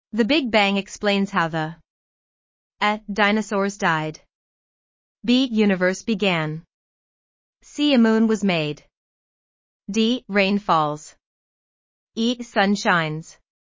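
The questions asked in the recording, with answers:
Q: The Big Bang explains how the A. Dinosaurs died. B. Universe began. C. A moon was made. D. Rain falls. E. Sun shines.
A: B: Universe began.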